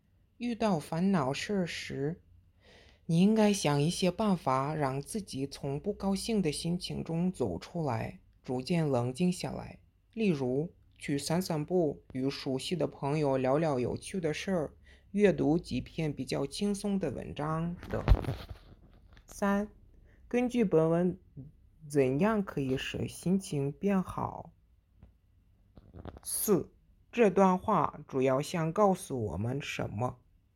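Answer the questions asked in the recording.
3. 去散散步,与熟悉的朋友聊聊有趣的事儿,阅读比较轻松的文章
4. 遇到烦恼时应该想办法让自己走出不高兴的心情,冷静下来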